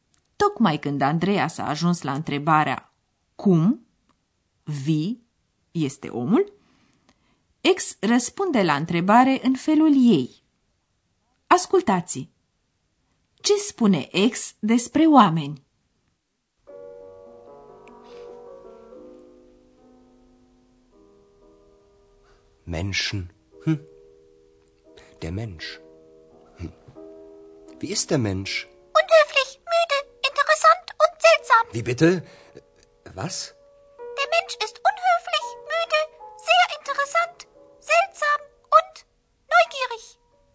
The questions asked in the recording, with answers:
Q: Ce spune Ex despre oameni?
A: Așadar, ex știe cum sunt oamenii, sau mai bine zis, crede că știe, și anume curioși, neugierig.